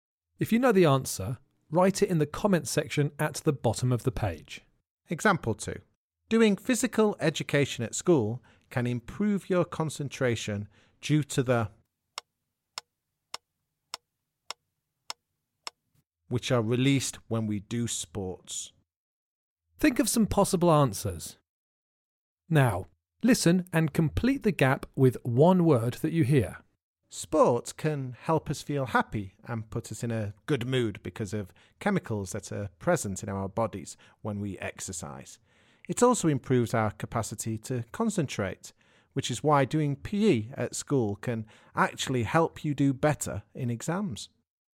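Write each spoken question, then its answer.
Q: Doing physical education at school can improve your concentration due to the... which are released when we do sports.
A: chemicals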